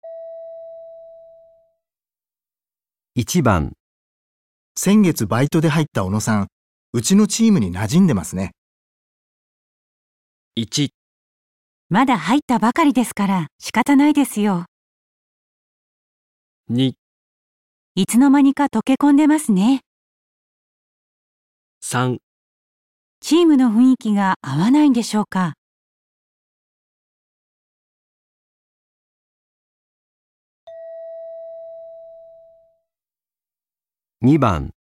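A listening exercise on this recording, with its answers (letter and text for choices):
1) 先月バイトで入った小野さん、うちのチームに馴染んでますね。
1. まだ入ったばかりですから仕方ないですよ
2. いつの間にか溶け込んでますね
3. チームの雰囲気が合わないんでしょうか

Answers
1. 2. いつの間にか溶け込んでますね

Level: N1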